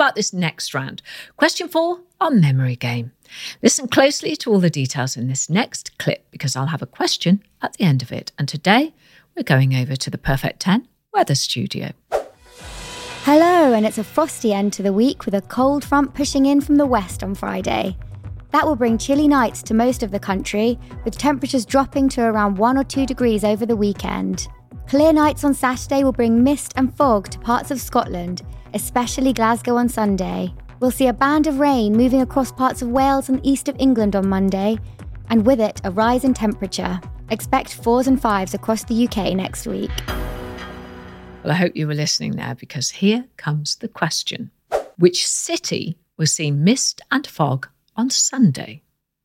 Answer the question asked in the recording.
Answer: The answer in the clip was Glasgow.